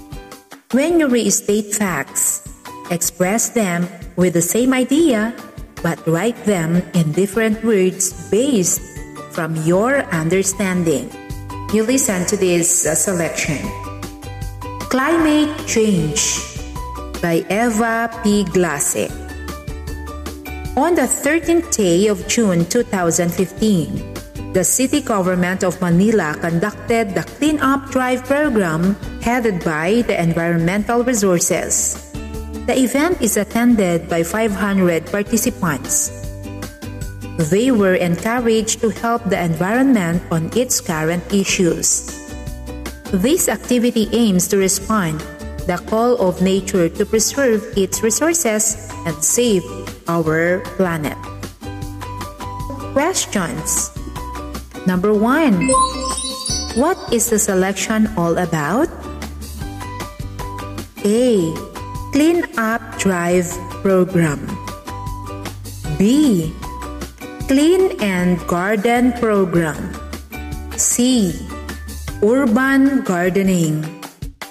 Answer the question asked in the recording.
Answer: The answer is A. Clean Up Drive Program.